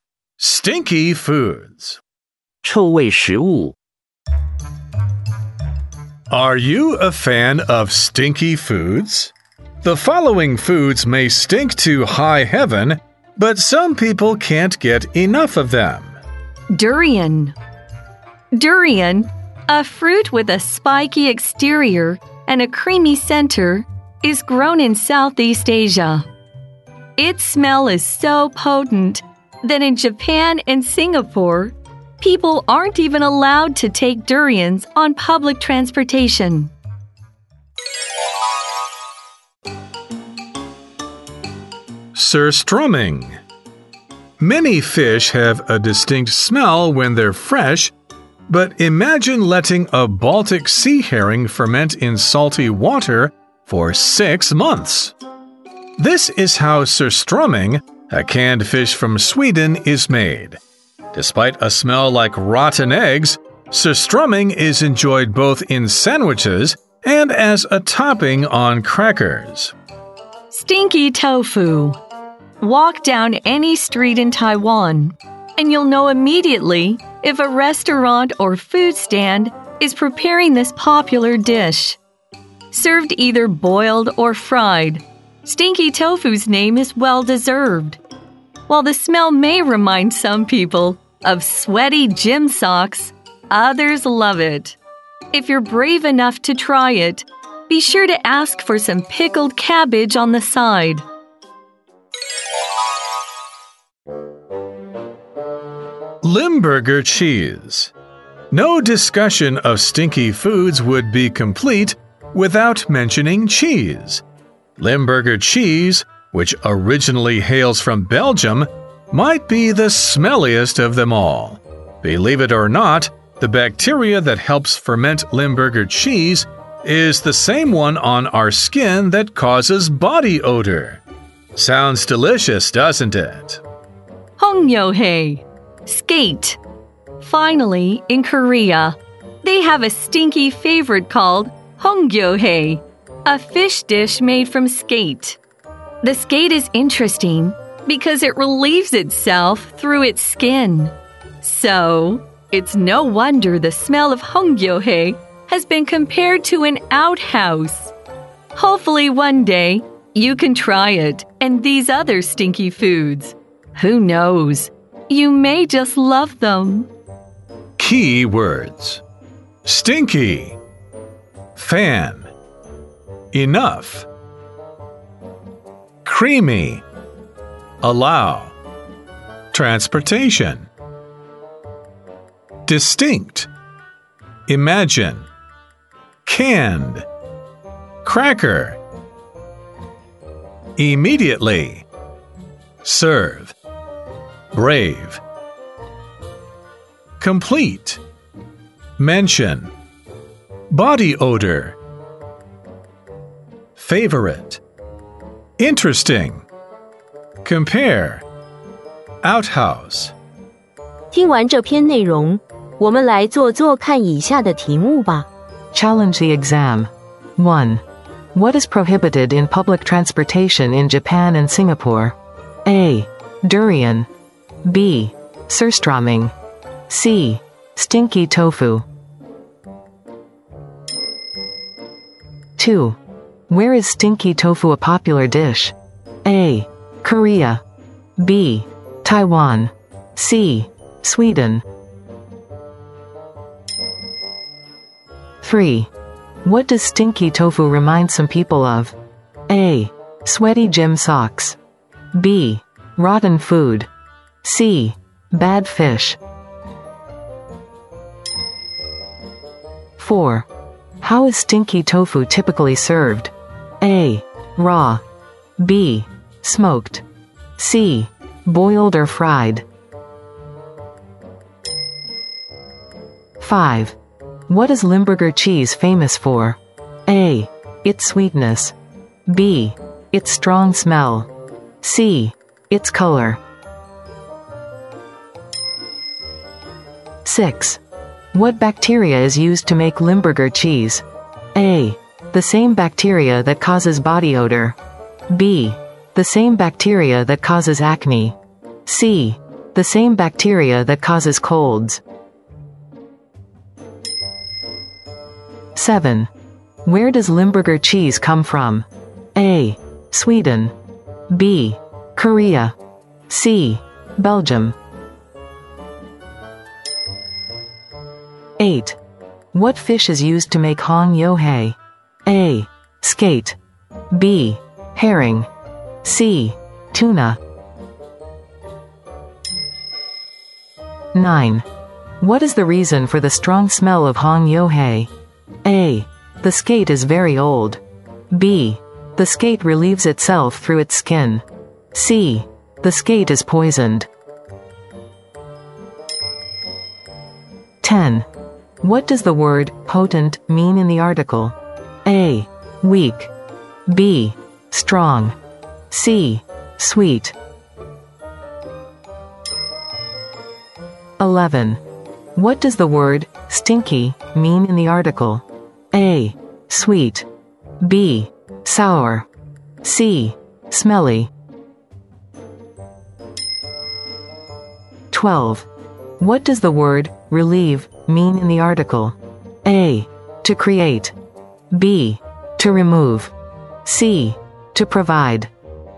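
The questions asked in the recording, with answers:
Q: What is prohibited in public transportation in Japan and Singapore?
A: A: Durian.

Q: Where is stinky tofu a popular dish?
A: B: Taiwan.

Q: What does stinky tofu remind some people of?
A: A: Sweaty gym socks.

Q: How is stinky tofu typically served?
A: C: Boiled or fried.

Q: What is Limburger cheese famous for?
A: B: Its strong smell.

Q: What bacteria is used to make Limburger cheese?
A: A: The same bacteria that causes body odor.

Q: Where does Limburger cheese come from?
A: C: Belgium.

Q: What fish is used to make hongyohei?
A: A: Skate.

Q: What is the reason for the strong smell of hongyohei?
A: B: The skate relieves itself through its skin.

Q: What does the word potent mean in the article?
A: B: Strong.

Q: What does the word stinky mean in the article?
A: C: Smelly.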